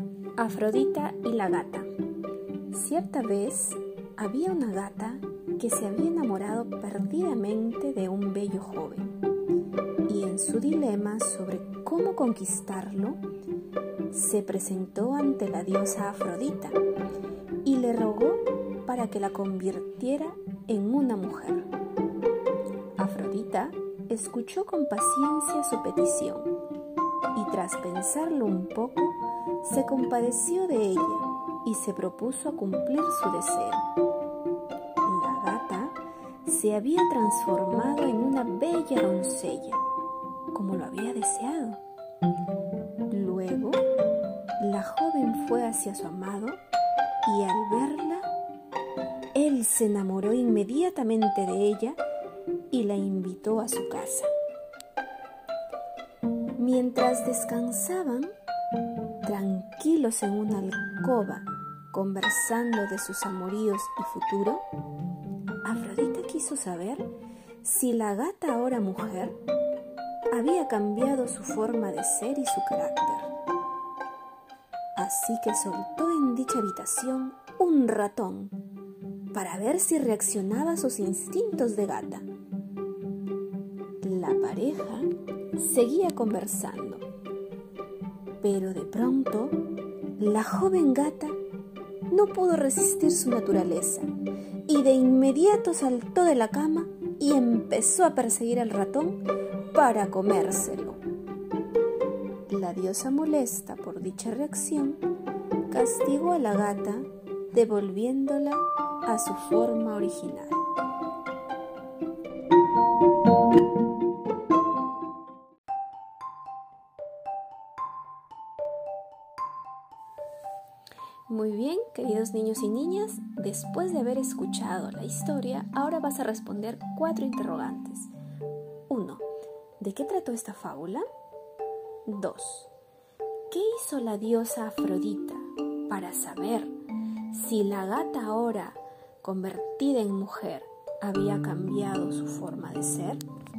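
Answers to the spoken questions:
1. De una gata enamorada de un joven a la que Afrodita convirtió en mujer, pero que volvió a ser gata al perseguir a un ratón
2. Soltó un ratón en la habitación para ver si reaccionaba como gata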